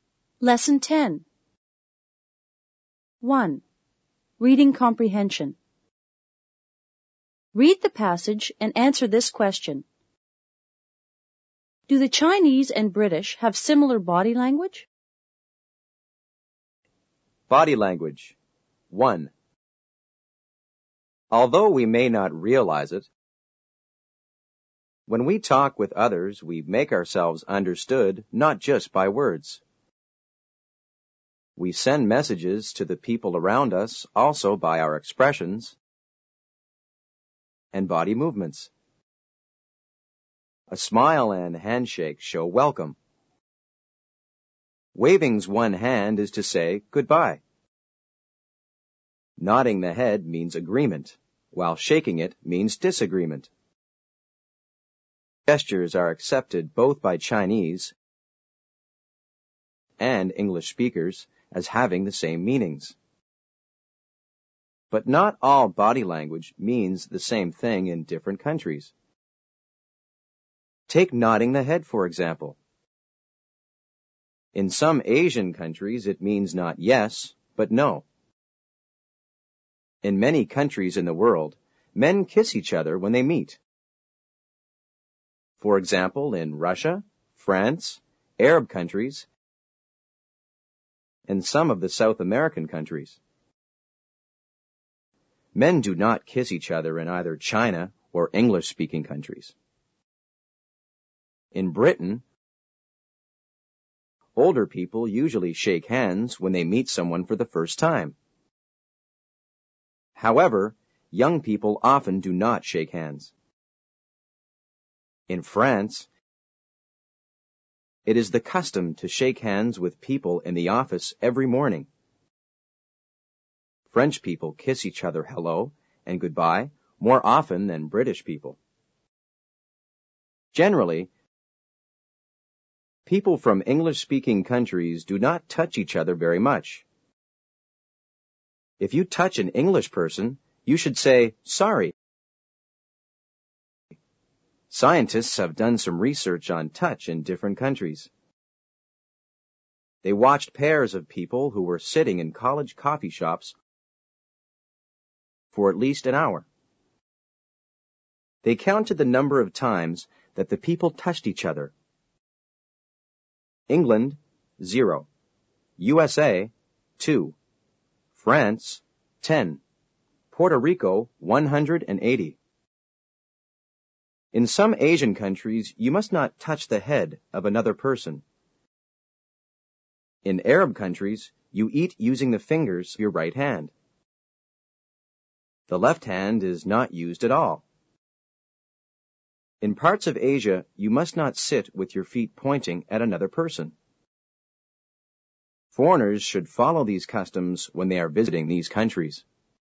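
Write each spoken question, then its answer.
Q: Do the Chinese and British have similar body language?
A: Partly: some gestures, such as smiling, shaking hands, waving and nodding, mean the same thing, but not all body language is the same.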